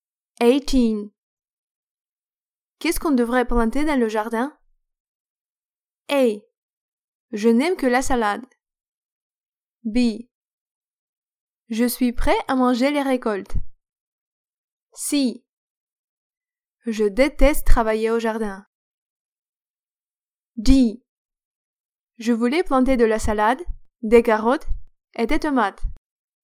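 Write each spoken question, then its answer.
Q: Qu'est-ce qu'on devrait planter dans le jardin?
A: D: Je voulais planter de la salade, des carottes et des tomates.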